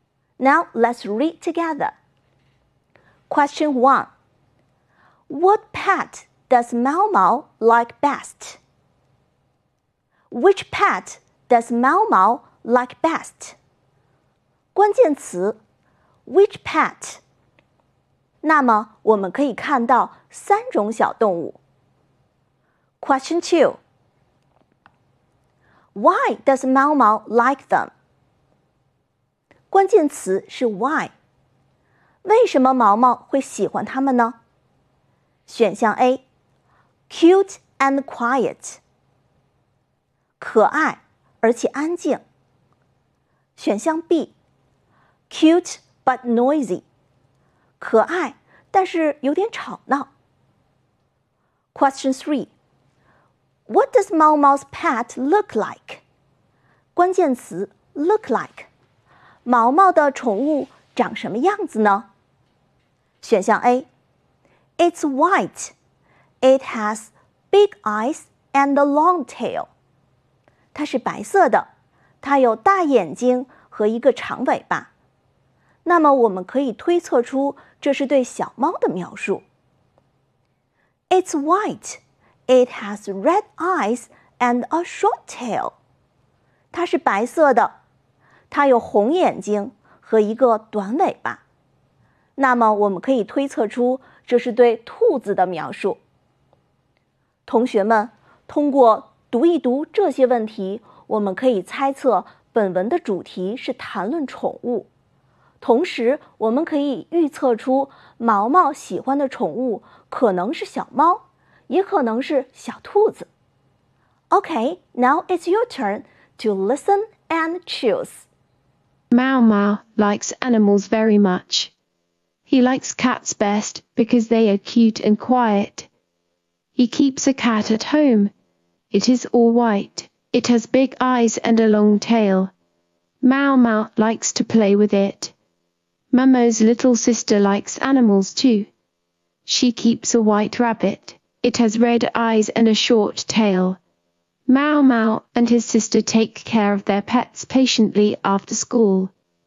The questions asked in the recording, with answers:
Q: Which pet does Mao Mao like best?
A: Mao Mao likes cat best.

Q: Why does Mao Mao like them?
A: Mao Mao likes them because they are cute and quiet.

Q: what does Mao Mao's pet look like?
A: Yes, it's white.And it has big eyes and a long tail.